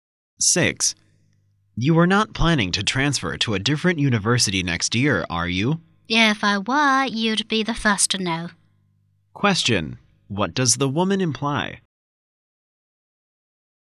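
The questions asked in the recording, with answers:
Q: What does the woman imply?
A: She isn't planning to transfer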